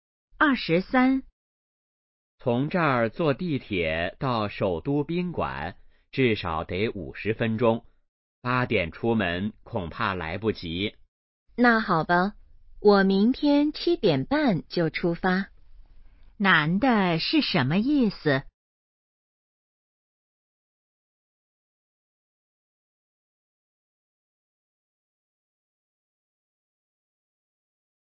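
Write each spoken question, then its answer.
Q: 男的是什么意思?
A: 明天7点半出发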